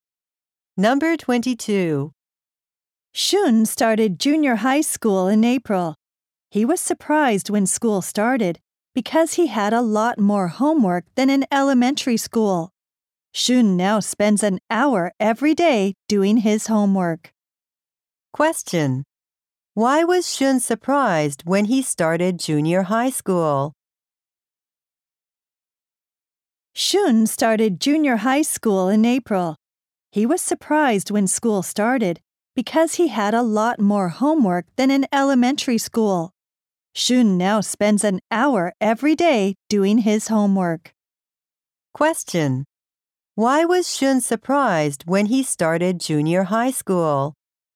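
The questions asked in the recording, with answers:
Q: Why was Shun surprised when he started junior high school?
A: He had a lot more homework than in elementary school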